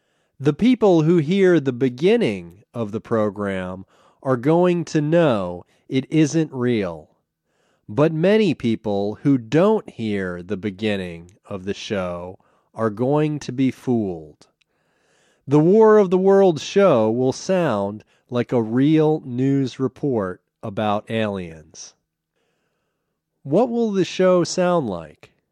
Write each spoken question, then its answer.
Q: What will the show sound like?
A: The show will sound like a real news report about aliens.